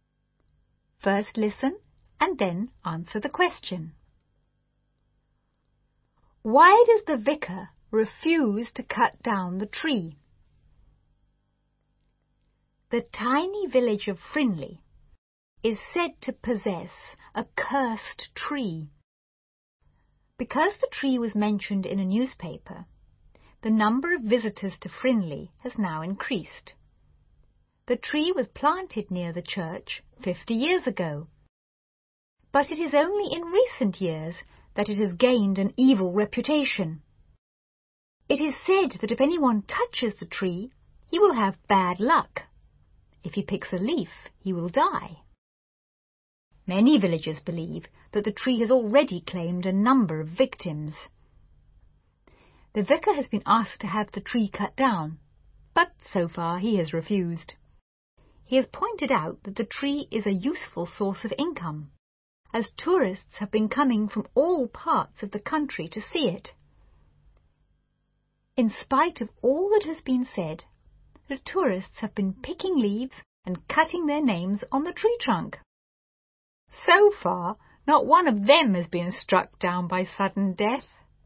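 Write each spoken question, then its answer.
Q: Why does the vicar refuse to cut down the tree?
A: Because it is a useful source of income, as tourists come from all over the country to see it.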